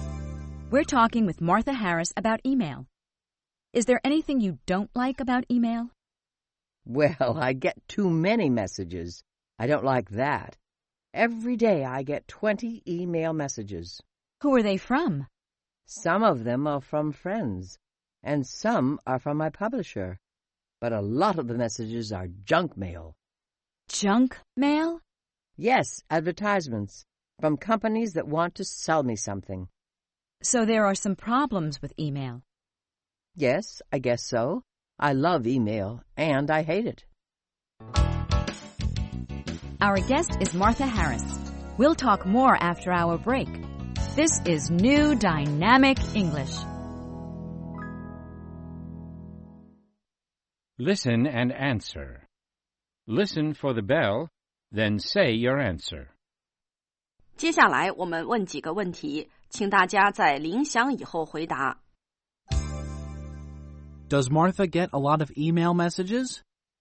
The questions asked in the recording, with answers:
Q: Does Martha get a lot of email messages?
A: Yes, she gets too many messages.